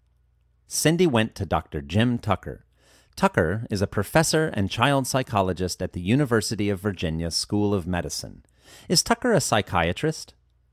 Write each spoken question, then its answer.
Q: Is Tucker a psychiatrist?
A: No, Tucker is not a psychiatrist.